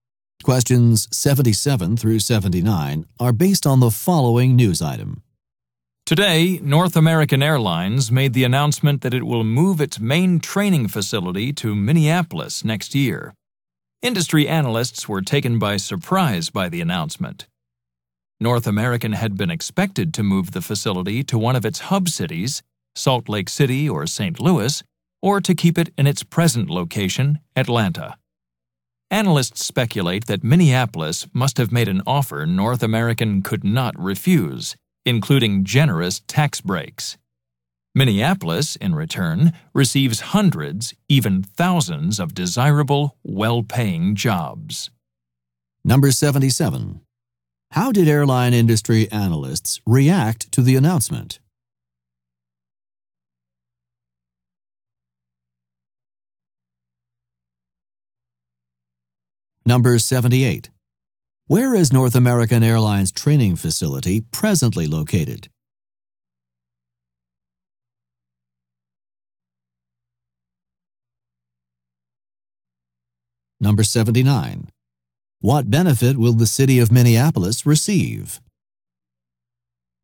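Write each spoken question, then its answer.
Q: How did airline industry analysts react to the announcement?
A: They were surprised

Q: Where is North American Airlines training facility presently located?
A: Atlanta

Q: What benefit will the city of Minneapolis receive?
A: Hundreds or thousands of well-paying jobs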